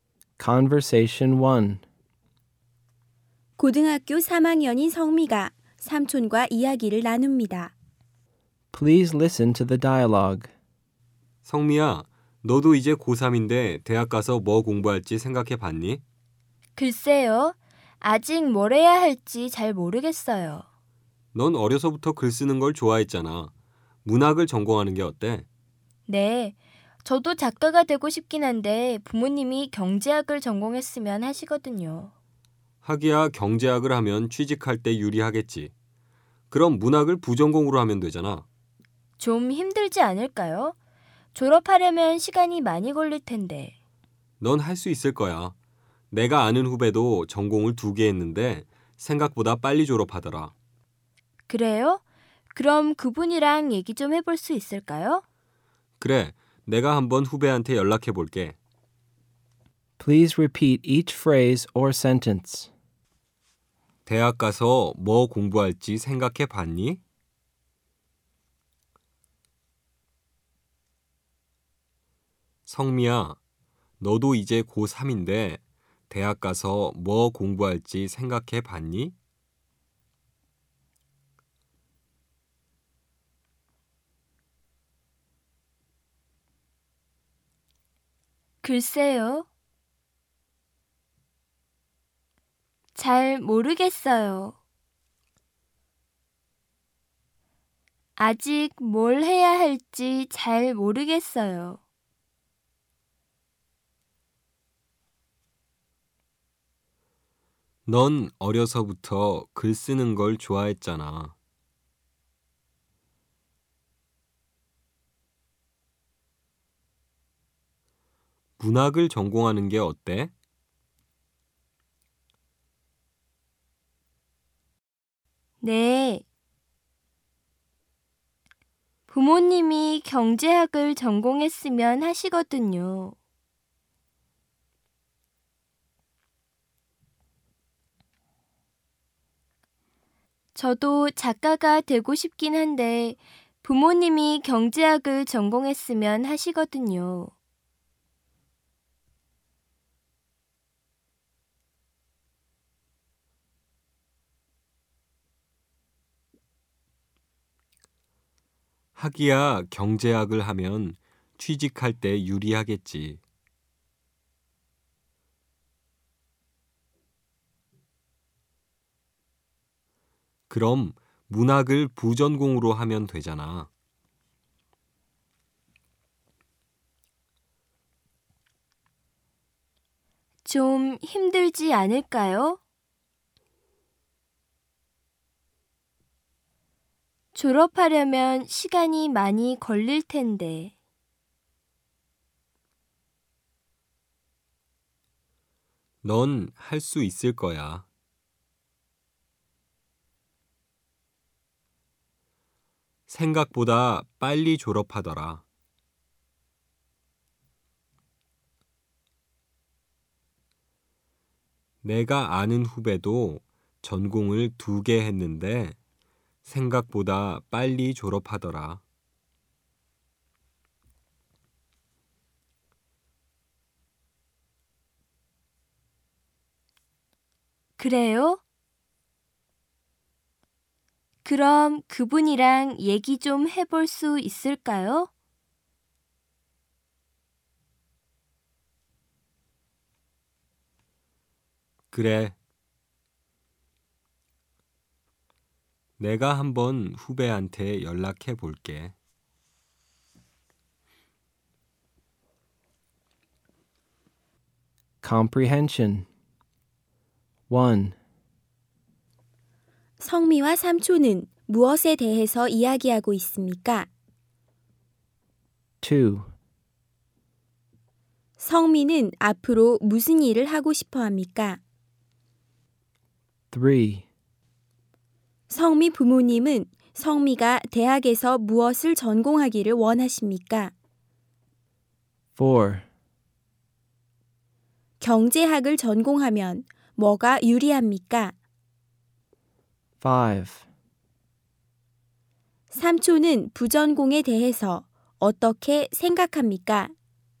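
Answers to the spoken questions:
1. 성미가 대학에서 무엇을 전공할지
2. 작가
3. 경제학
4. 취직할 때 유리하다
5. 문학을 부전공으로 하면 된다고, 성미도 할 수 있다고 생각한다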